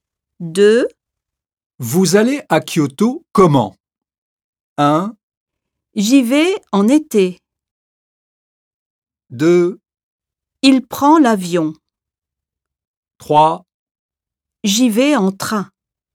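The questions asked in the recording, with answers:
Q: Vous allez à Kyoto comment?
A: 3: J'y vais en train.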